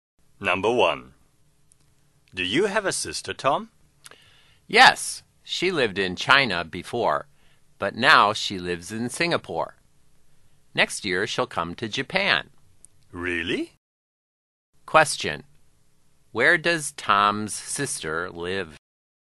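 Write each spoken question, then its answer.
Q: Where does Tom's sister live?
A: In Singapore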